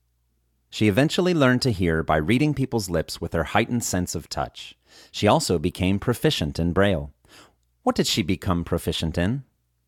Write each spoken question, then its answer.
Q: What did she become proficient in?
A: She became proficient in Braille.